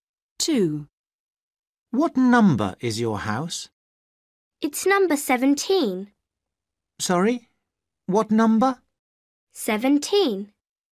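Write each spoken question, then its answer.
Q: What number is your house?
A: 17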